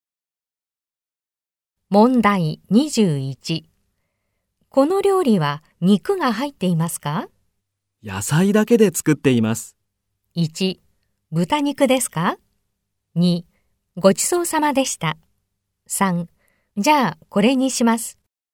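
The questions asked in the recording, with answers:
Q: この料理は肉が入っていますか?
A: 2: じゃあ、これにします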